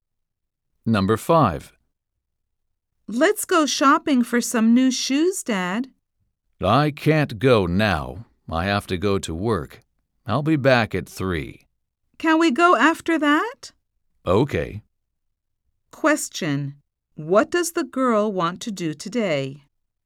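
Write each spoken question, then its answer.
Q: What does the girl want to do today?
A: Go shopping for new shoes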